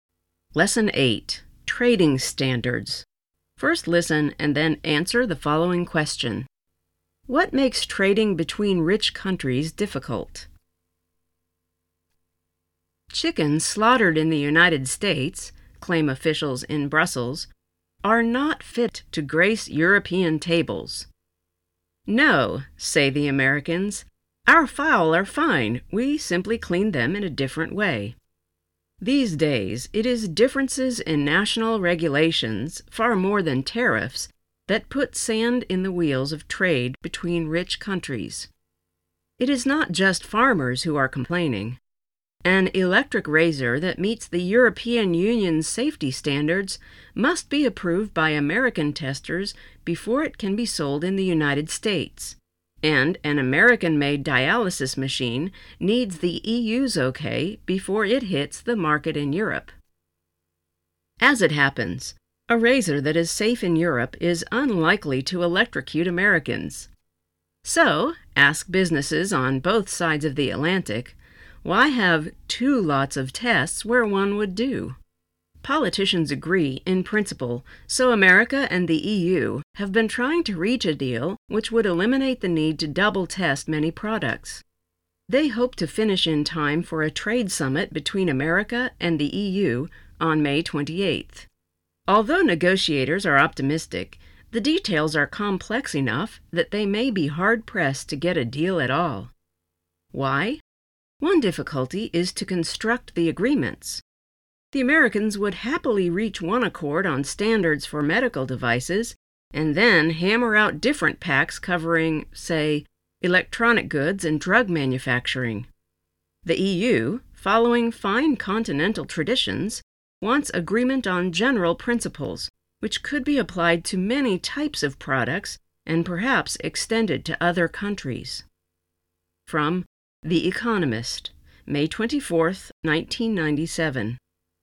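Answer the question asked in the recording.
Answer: Differences in national regulations (far more than tariffs)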